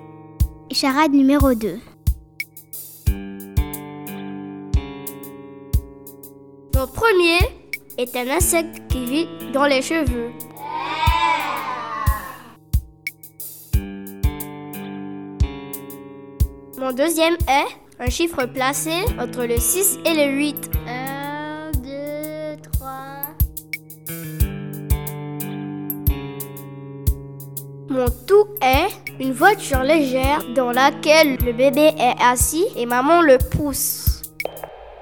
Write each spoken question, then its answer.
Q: Mon tout est... une voiture légère dans laquelle le bébé est assis et maman le pousse.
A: La bonne réponse est... la poussette.